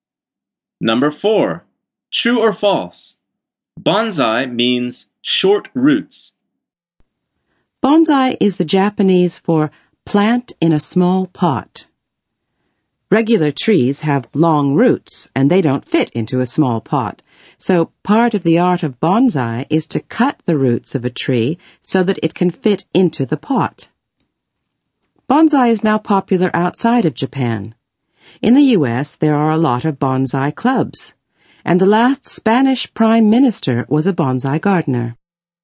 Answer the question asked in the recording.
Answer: The answer is false.